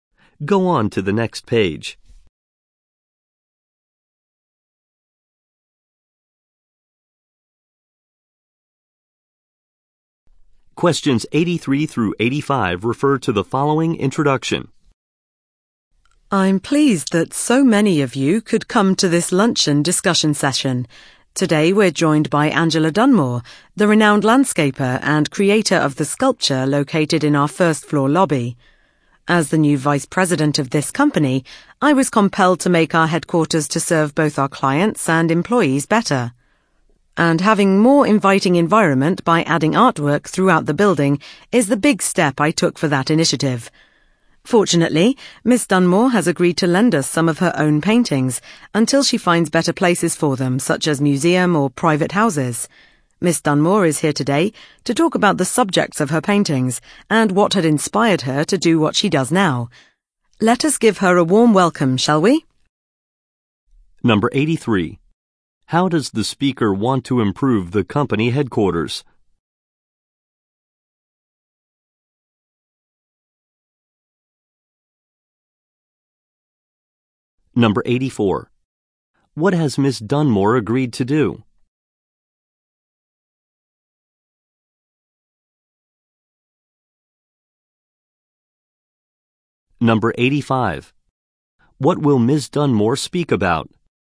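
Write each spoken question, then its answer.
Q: How does the speaker want to improve the company headquarters?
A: By adding artwork throughout the building

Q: What has Miss Dunmore agreed to do?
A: Lend some of her paintings

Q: What will Miss Dunmore speak about?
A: The subjects of her paintings and her inspiration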